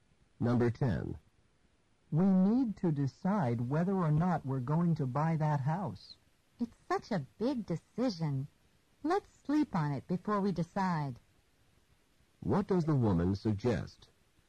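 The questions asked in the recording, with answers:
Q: What does the woman suggest?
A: Waiting until tomorrow to decide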